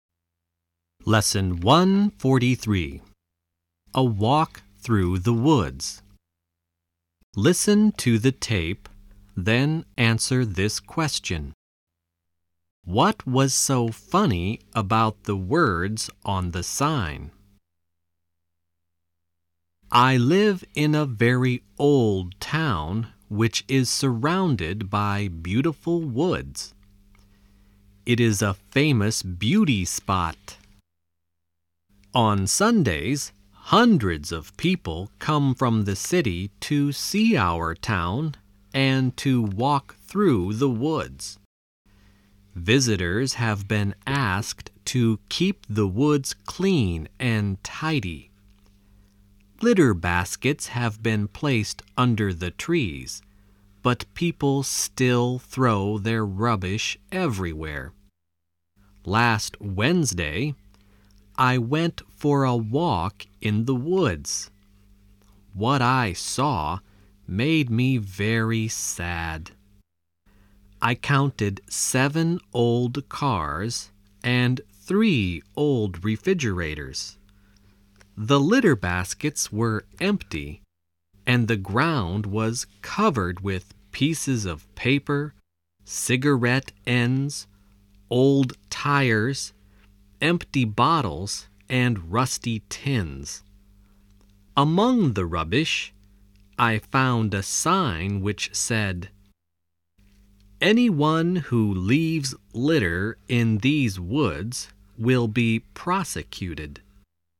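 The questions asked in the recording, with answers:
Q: What was so funny about the words on the sign?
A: The sign warning that litter-droppers would be prosecuted was itself lying among the rubbish.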